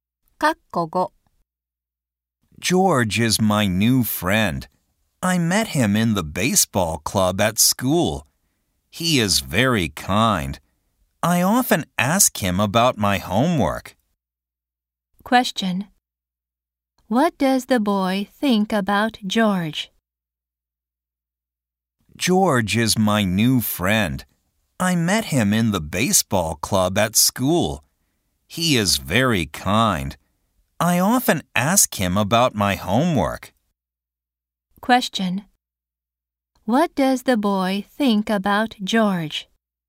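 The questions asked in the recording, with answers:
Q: What does the boy think about George?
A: He is very kind.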